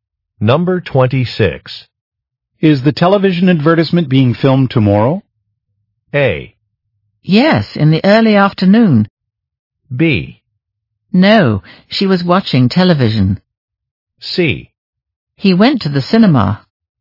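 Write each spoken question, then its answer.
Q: Is the television advertisement being filmed tomorrow?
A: A: Yes, in the early afternoon.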